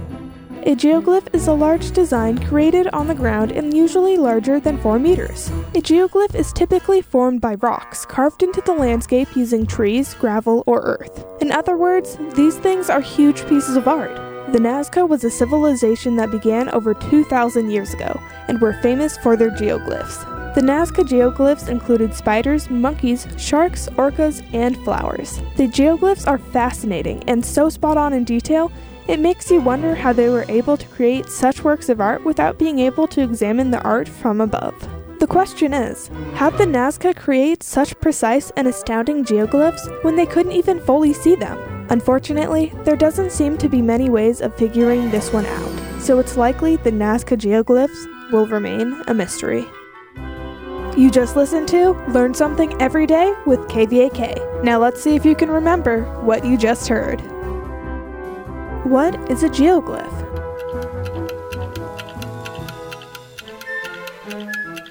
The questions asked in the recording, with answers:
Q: What is a geoglyph?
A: A geoglyph is a large design created on the ground and usually larger than 4 meters.